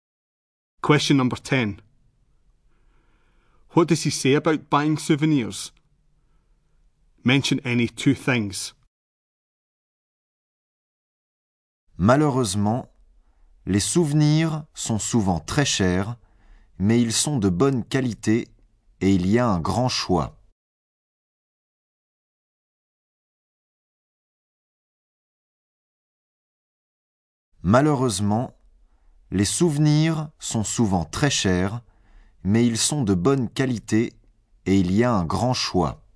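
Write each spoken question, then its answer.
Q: What does he say about buying souvenirs?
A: Often very expensive, but good quality and a big choice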